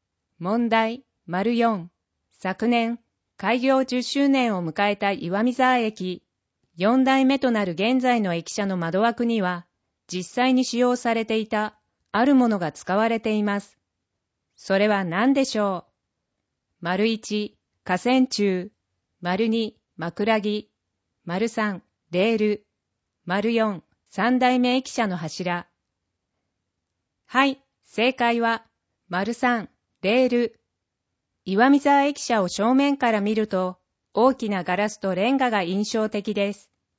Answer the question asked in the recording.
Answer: 正解は、3、レール